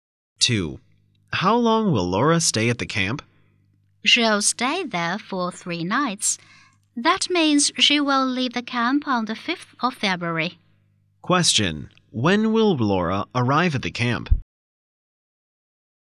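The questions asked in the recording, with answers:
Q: When will Laura arrive at the camp?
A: On the 2nd of February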